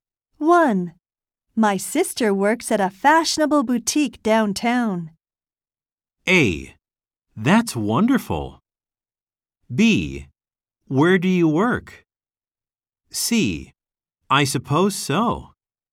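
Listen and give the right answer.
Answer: A: That's wonderful.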